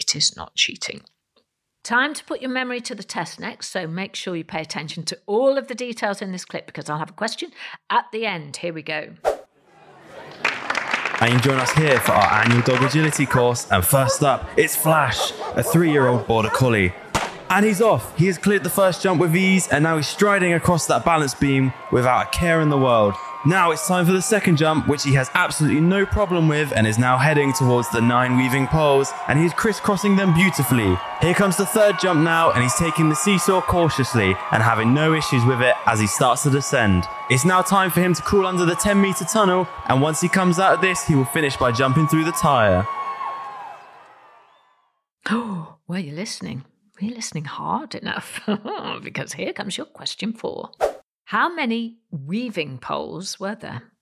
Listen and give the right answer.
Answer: The answer was 9 weaving poles.